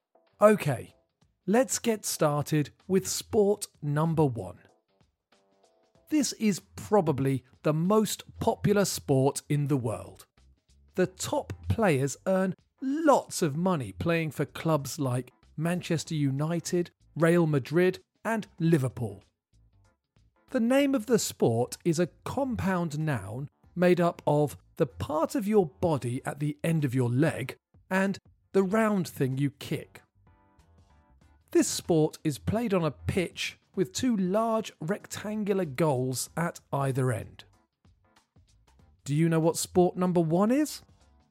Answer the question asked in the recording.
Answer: The answer is football, or soccer in American English.